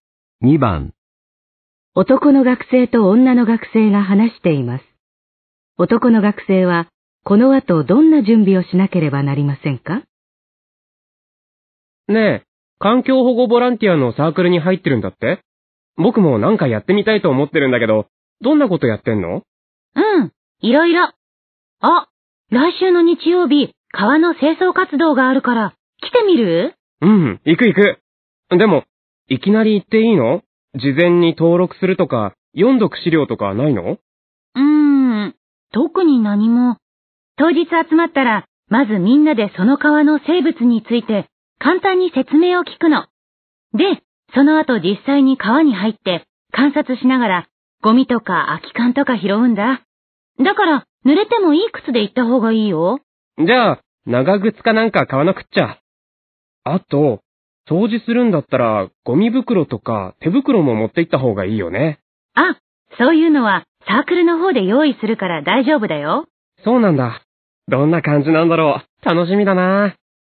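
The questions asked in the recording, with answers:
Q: 男の学生は、この後どんな準備をしなければなりませんか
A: 濡れてもいい靴(長靴)を買う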